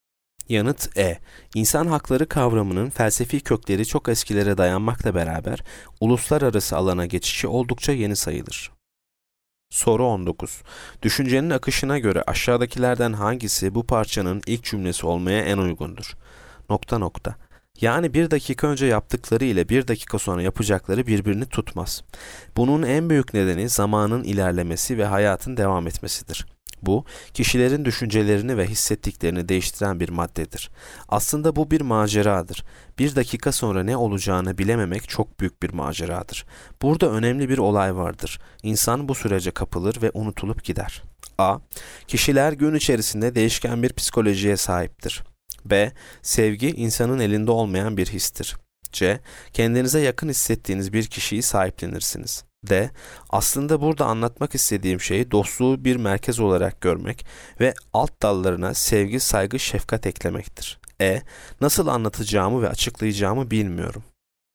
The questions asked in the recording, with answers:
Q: Düşüncenin akışına göre aşağıdakilerden hangisi bu parçanın ilk cümlesi olmaya en uygundur?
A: Yanıt A. Kişiler gün içerisinde değişken bir psikolojiye sahiptir.